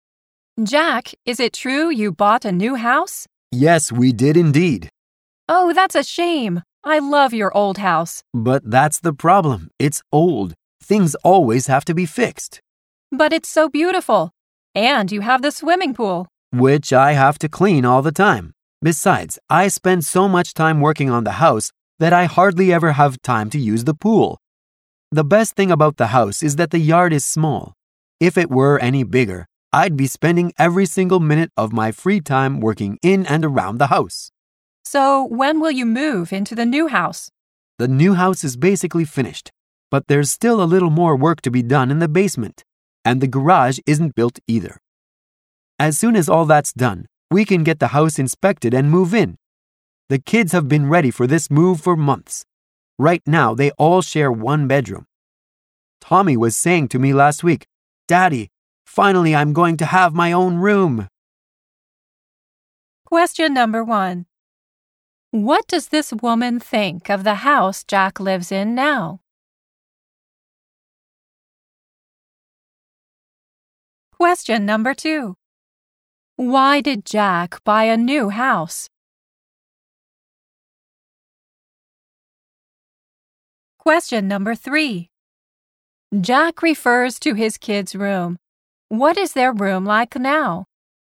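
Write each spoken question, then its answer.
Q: What does this woman think of the house Jack lives in now?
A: She loves it; she thinks it's beautiful.

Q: Why did Jack buy a new house?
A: Because his old house is old and always needs fixing.

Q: Jack refers to his kids' room. What is their room like now?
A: All the kids share one bedroom.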